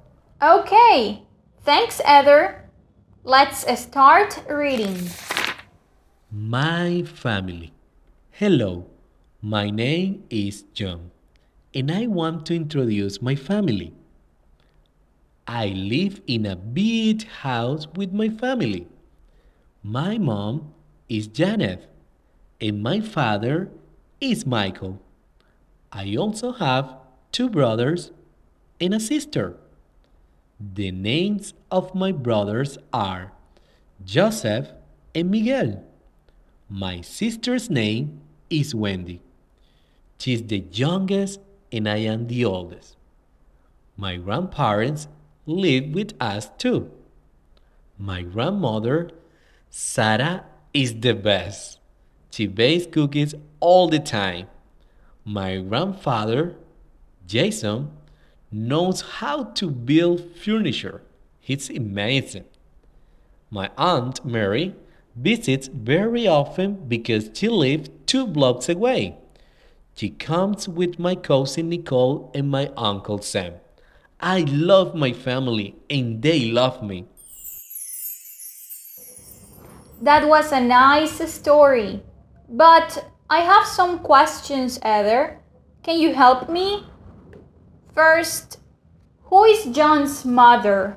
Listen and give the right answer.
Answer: John's mother is Janet.